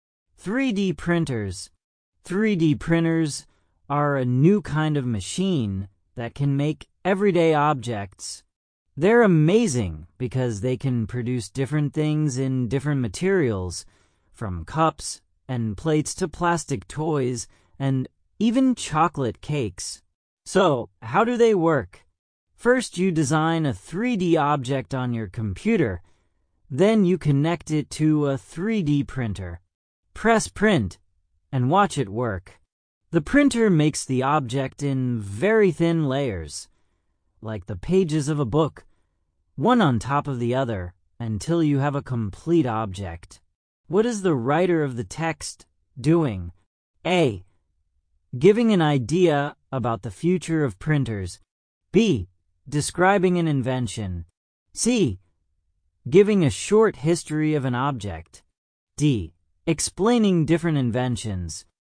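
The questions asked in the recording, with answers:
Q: What is the writer of the text doing?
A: B: Describing an invention.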